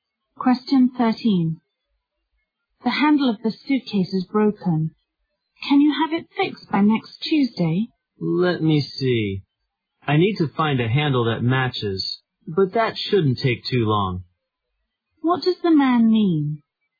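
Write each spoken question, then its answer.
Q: What does the man mean?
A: He can fix the suitcase by next Tuesday.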